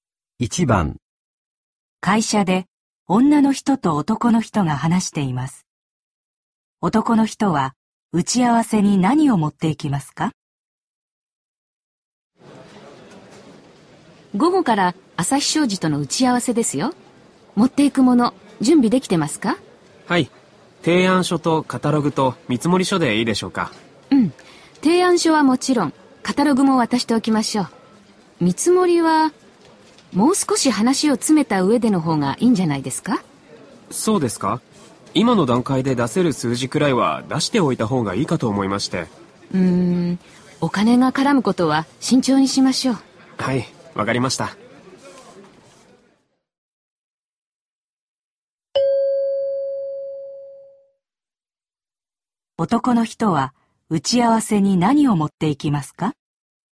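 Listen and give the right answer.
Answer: 提案書とカタログ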